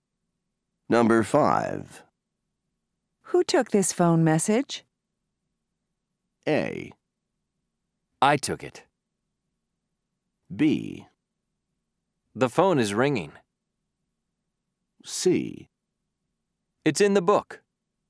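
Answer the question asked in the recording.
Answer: A: I took it.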